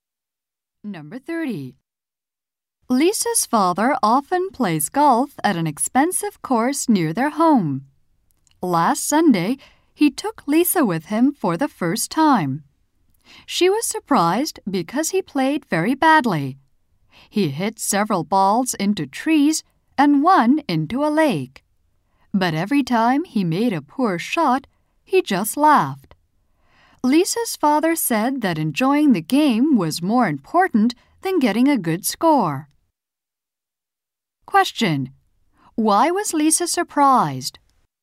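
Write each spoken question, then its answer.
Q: Why was Lisa surprised?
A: Her father played golf very badly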